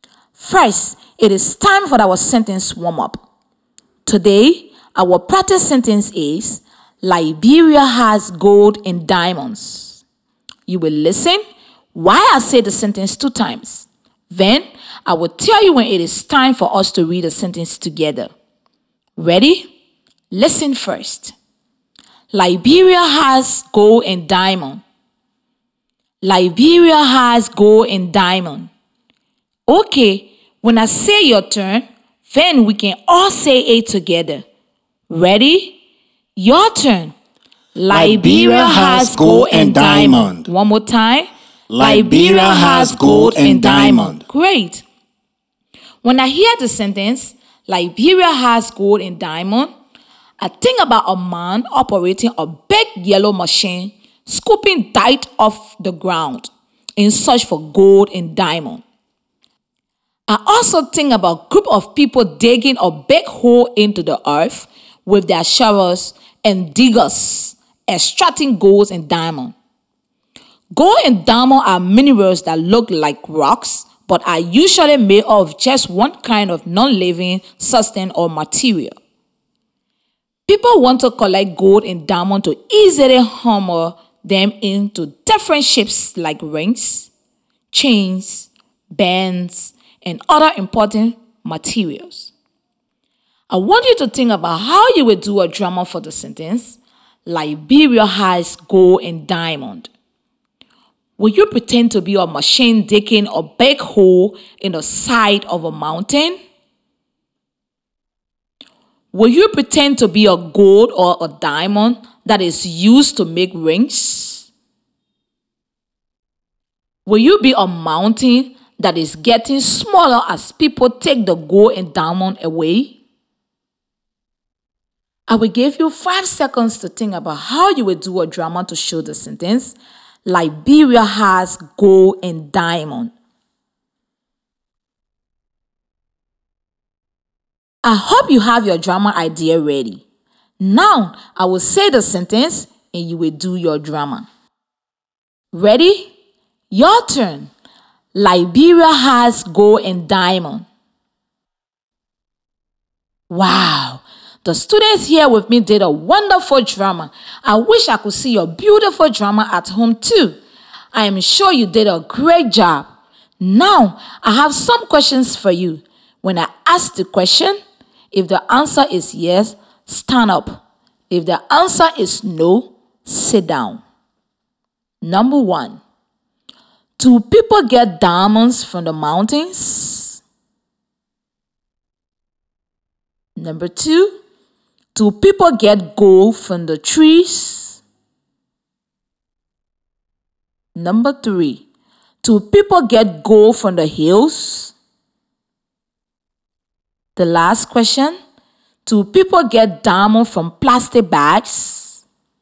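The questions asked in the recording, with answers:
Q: do people get diamonds from the mountains?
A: Yes

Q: do people get gold from the trees?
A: No

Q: do people get diamonds from plastic bags?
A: No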